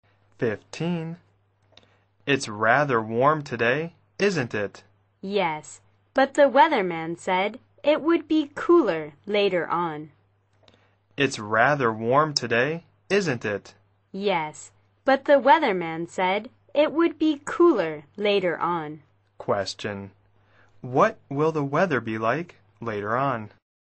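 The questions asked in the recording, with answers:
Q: What will the weather be like later on?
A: Cooler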